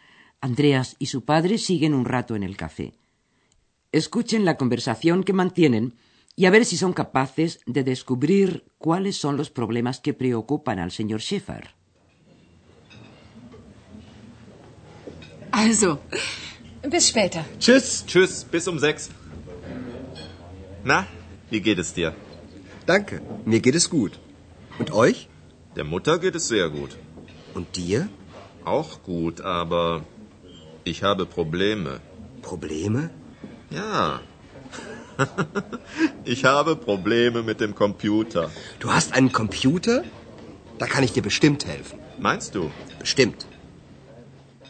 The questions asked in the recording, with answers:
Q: Escuchen la conversación que mantienen y a ver si son capaces de descubrir cuáles son los problemas que preocupan al señor Schäfer.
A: Tiene problemas con el ordenador